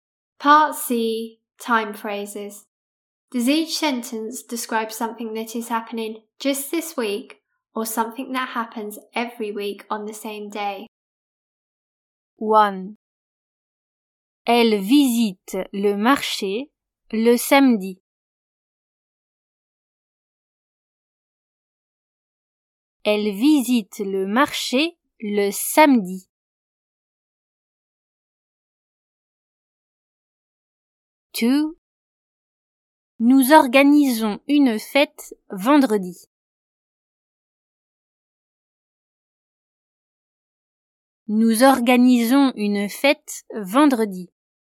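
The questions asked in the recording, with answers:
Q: Elle visite le marché le samedi.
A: every week on the same day

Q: Nous organisons une fête vendredi.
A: just this week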